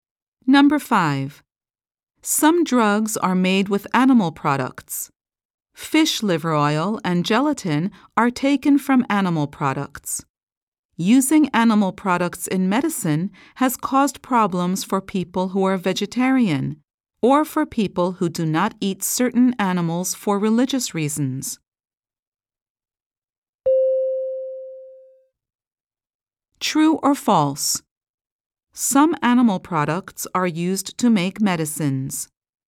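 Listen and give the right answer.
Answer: True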